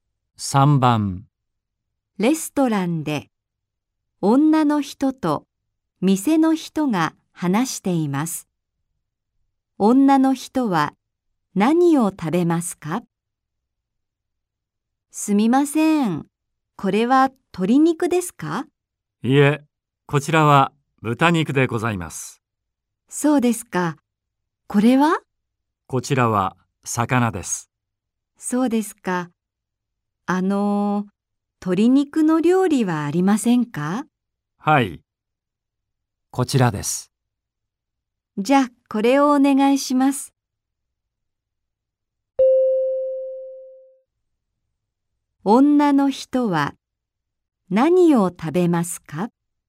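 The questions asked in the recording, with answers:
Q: 女の人は何を食べますか?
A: 鶏肉の料理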